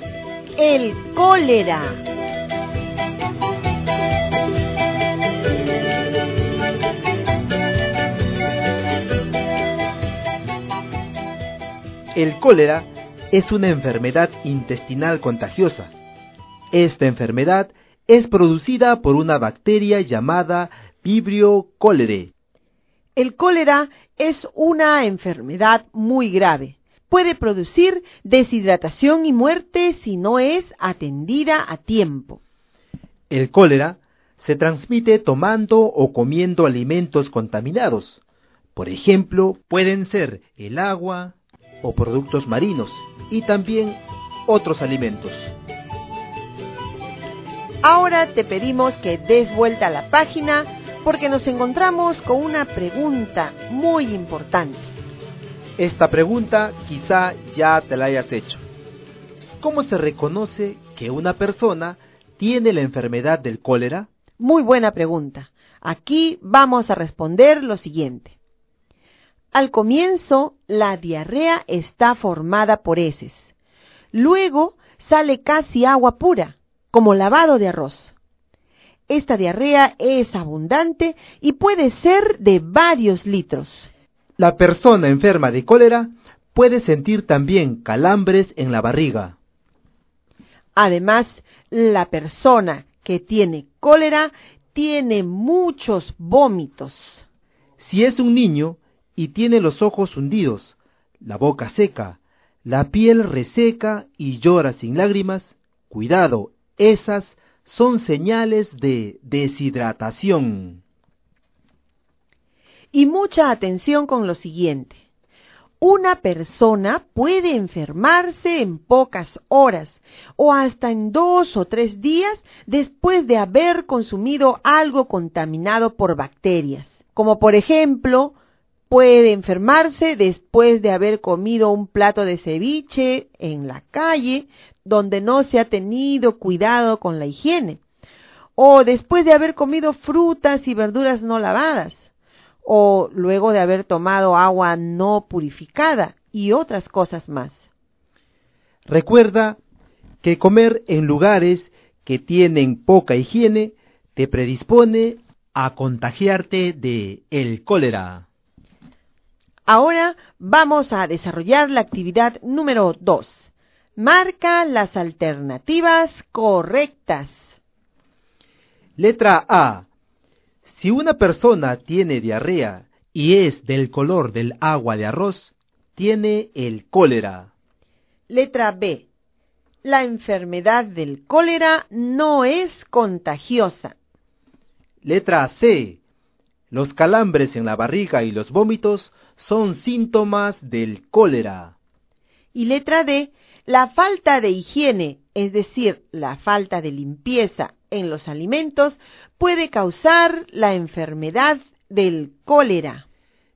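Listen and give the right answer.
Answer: A, C y D: A (diarrea color agua de arroz = cólera), C (calambres y vómitos son síntomas), D (falta de higiene causa cólera)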